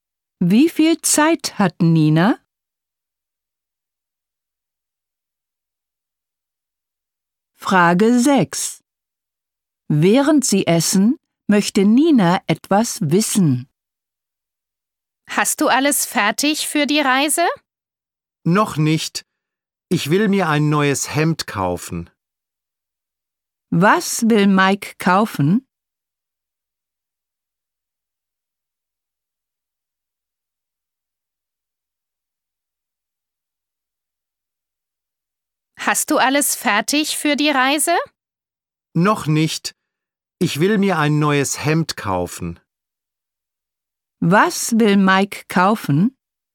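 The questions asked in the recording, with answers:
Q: Was will Mike kaufen?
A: Ein neues Hemd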